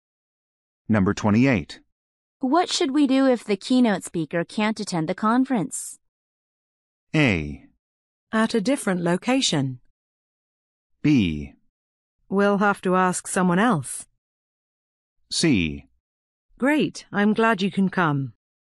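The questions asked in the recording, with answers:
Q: What should we do if the keynote speaker can't attend the conference?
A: B: We'll have to ask someone else.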